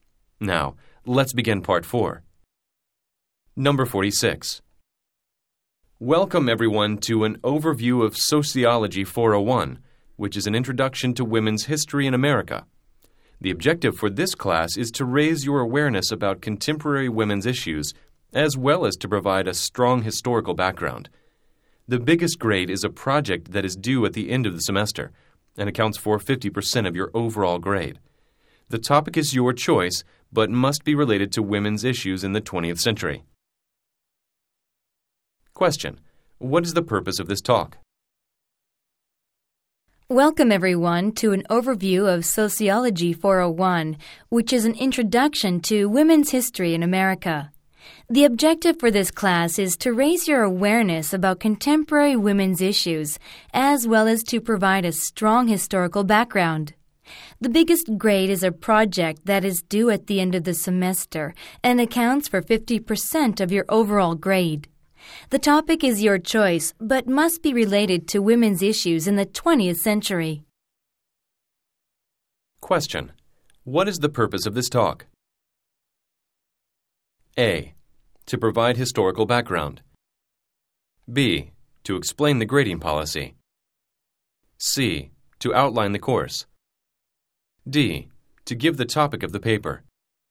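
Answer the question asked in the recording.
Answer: C: To outline the course.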